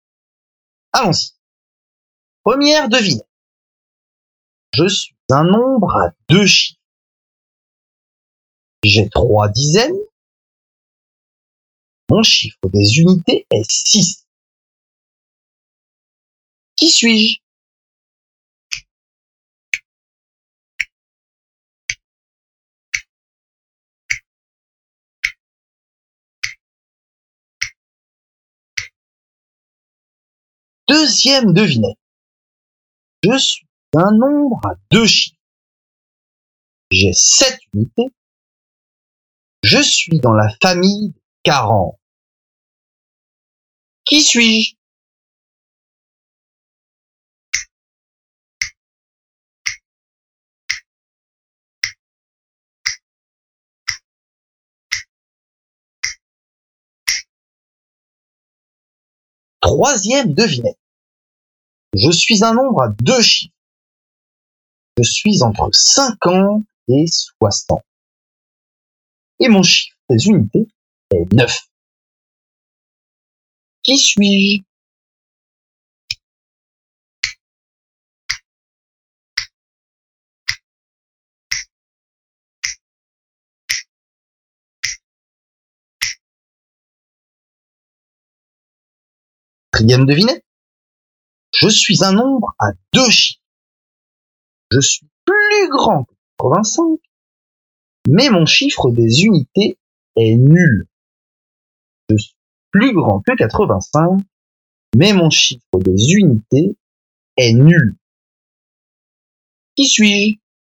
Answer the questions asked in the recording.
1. Son nom, c'est 36.
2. Donc j'écris 47.
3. 50 plus 9 est égal à 59. Son nom est 59.
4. Le premier nombre de cette famille est le nombre s'écrit 9 dizaines, 0 unités.